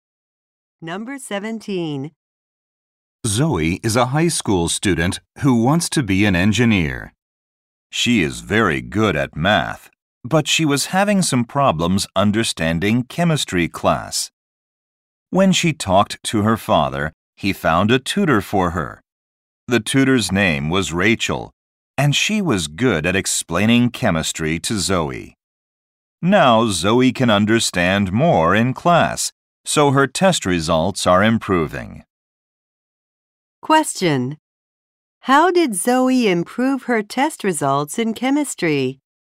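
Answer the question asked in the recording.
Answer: She got a tutor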